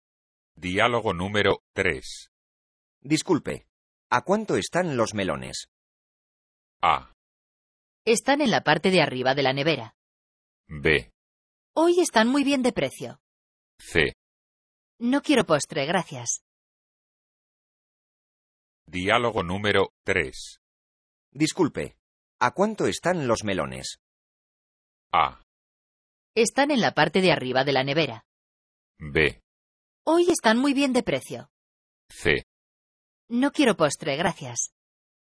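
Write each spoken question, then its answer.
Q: Disculpe, ¿a cuánto están los melones?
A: B: Hoy están muy bien de precio.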